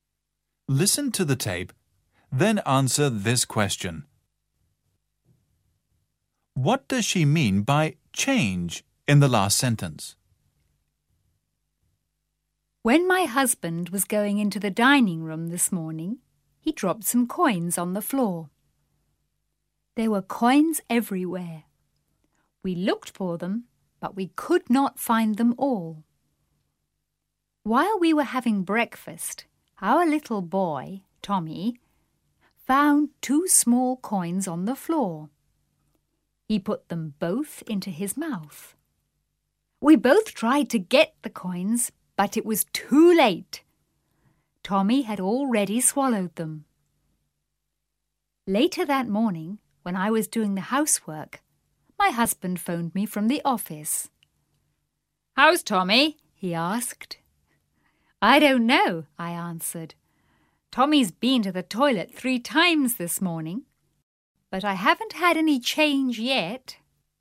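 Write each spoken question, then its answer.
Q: What does she mean by change in the last sentence?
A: The coins (money) Tommy swallowed; they haven't come out yet (a pun on change meaning coins)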